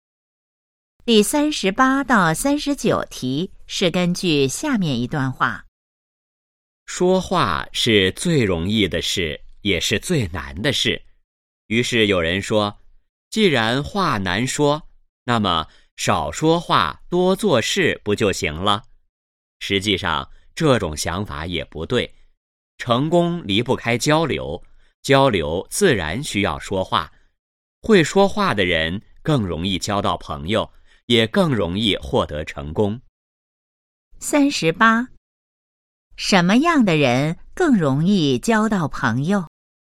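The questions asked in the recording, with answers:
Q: 什么样的人更容易交到朋友?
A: 会说话的人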